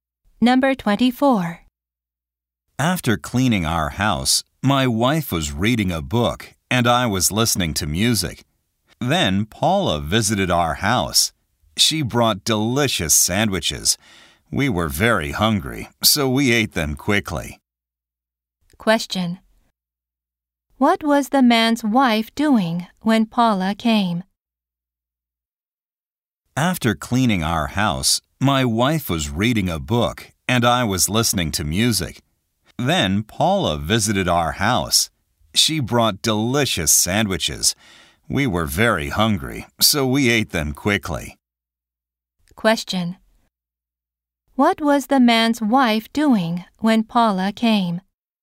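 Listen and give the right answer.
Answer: Reading a book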